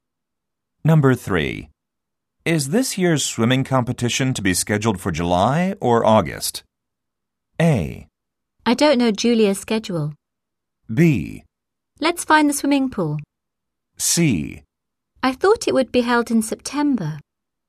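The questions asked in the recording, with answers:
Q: Is this year's swimming competition to be scheduled for July or August?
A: C: I thought it would be held in September.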